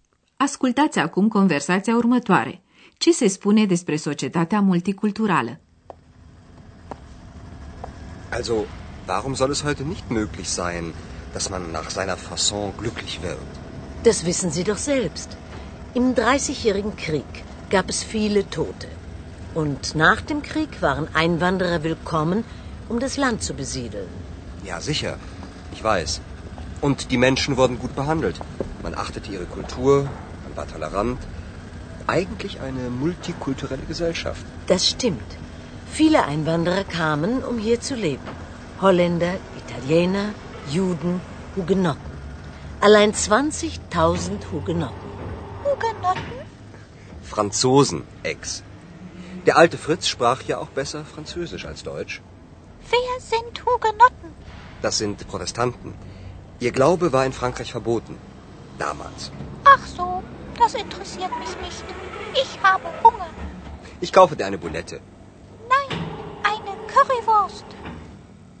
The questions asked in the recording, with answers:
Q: Ce se spune despre societatea multiculturală?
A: Oamenii erau bine tratați.